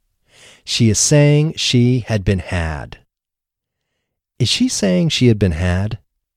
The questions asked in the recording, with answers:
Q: Is she saying she had been had?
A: Yes, she is saying she had been had.